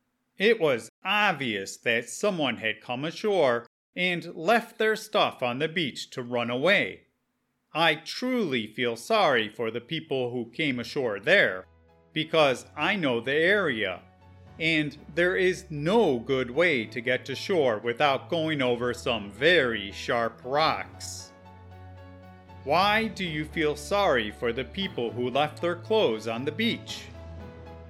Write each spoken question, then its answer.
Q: Why do you feel sorry for the people who left their clothes on the beach?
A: I felt particularly sorry for whoever came ashore in that location, because there was no way to avoid the sharp rocks in that area.